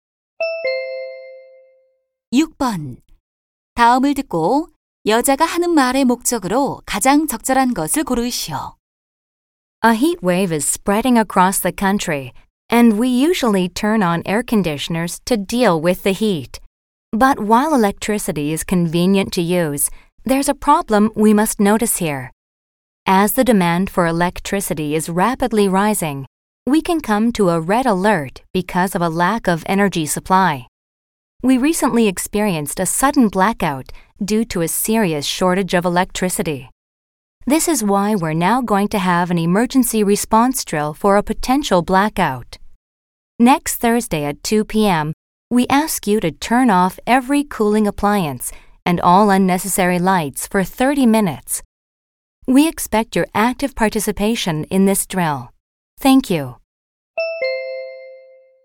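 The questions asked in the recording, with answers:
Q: 다음을 듣고 여자가 하는 말의 목적으로 가장 적절한 것을 고르시오.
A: 정전 대비 비상 훈련 참여 요청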